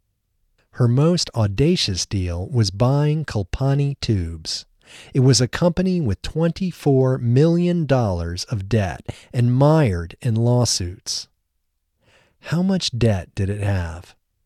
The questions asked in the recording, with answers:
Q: How much debt did it have?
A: It had $24 million of debt.